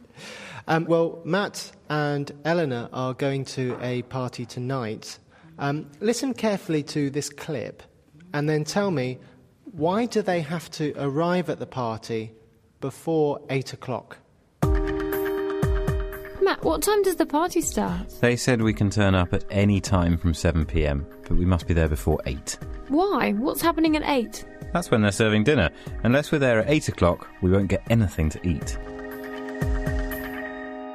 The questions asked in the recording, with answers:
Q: why do they have to arrive at the party before 8 o'clock?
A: Maybe they will have nothing to eat after 8 o'clock.